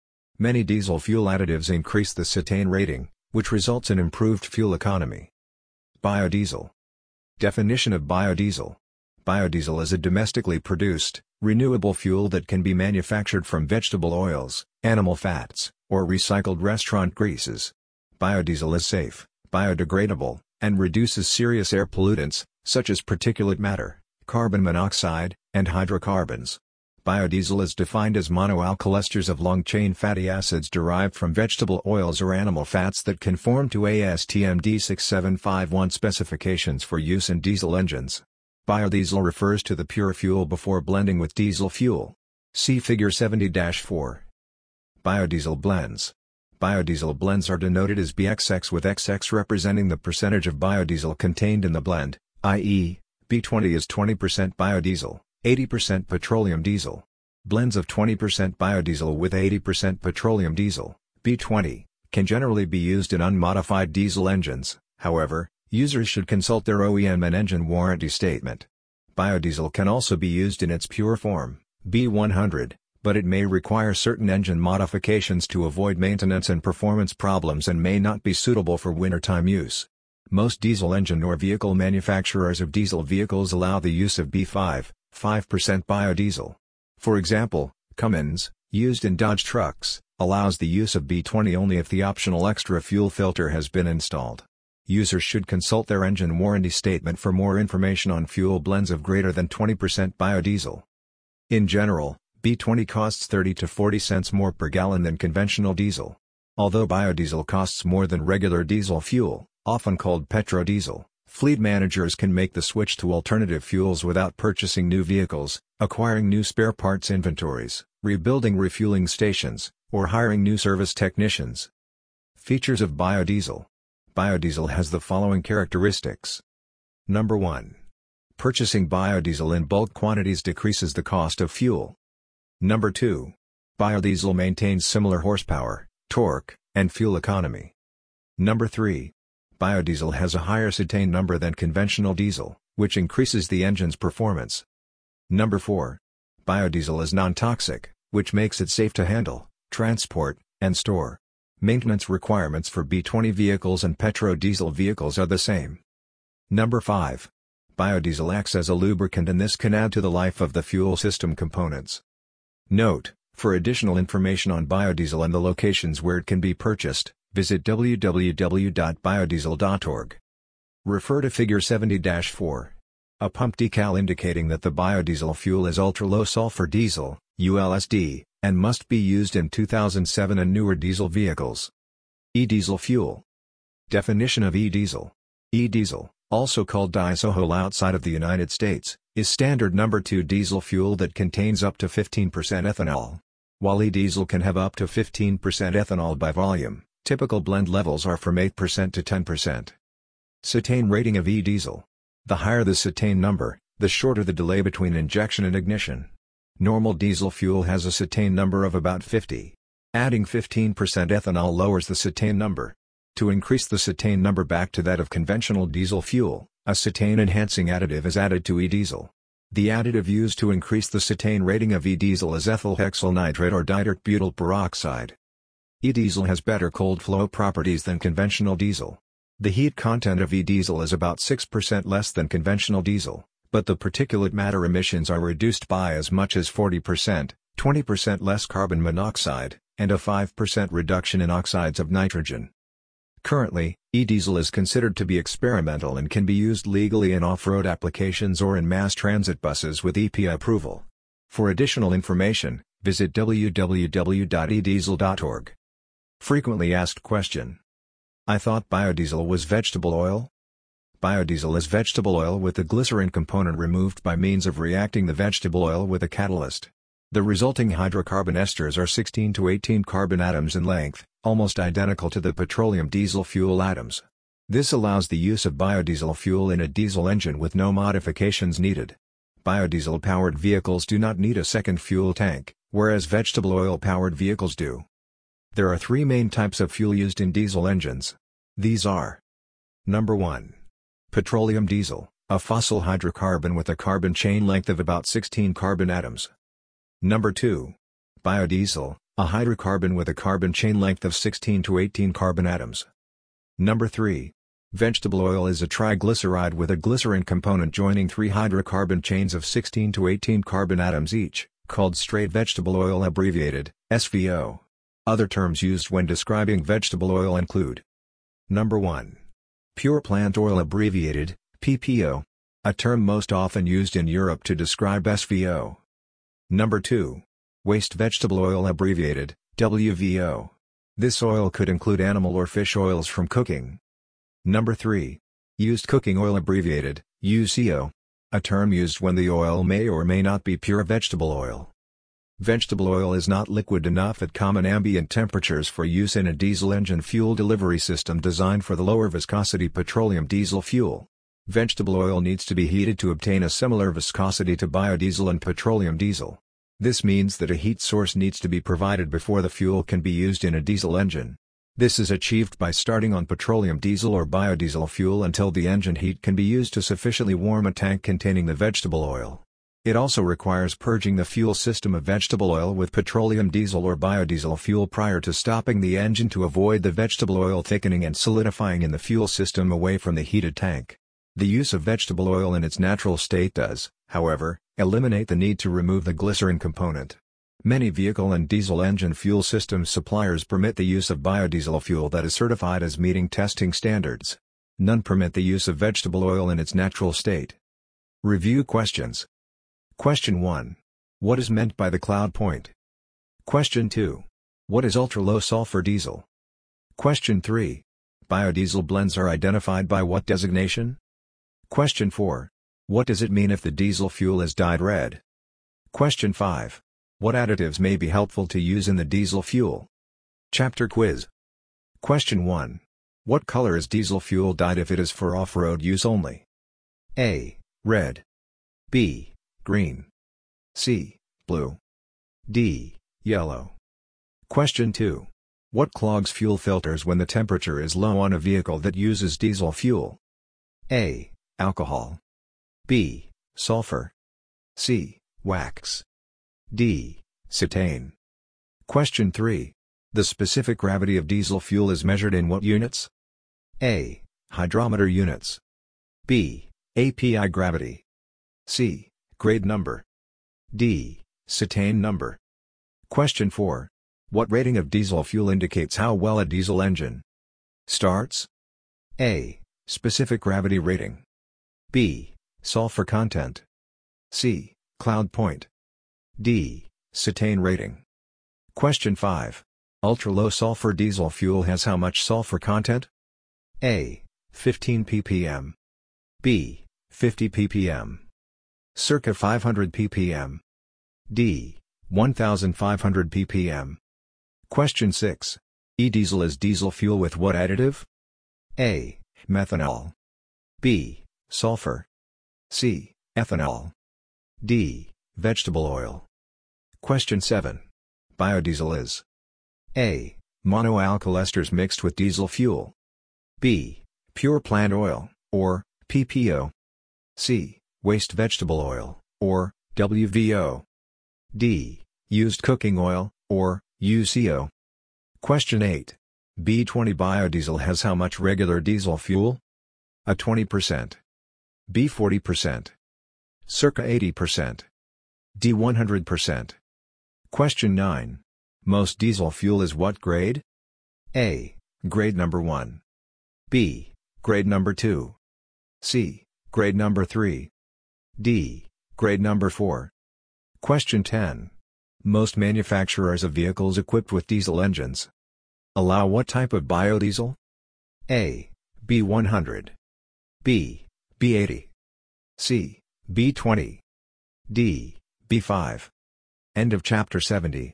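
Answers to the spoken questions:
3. BXX, where XX is the percentage of biodiesel in the blend
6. C: Ethanol
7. A: Monoalkyl esters mixed with diesel fuel
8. C: 80%
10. D: B5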